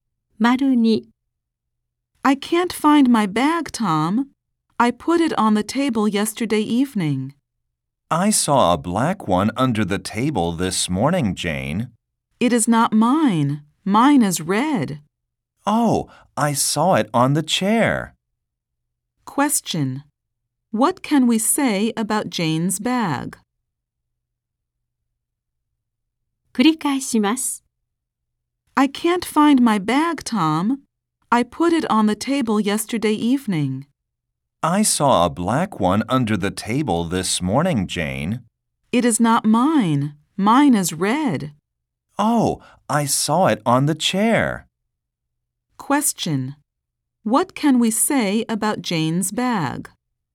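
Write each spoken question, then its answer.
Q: What can we say about Jane's bag?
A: It is red and it is on the chair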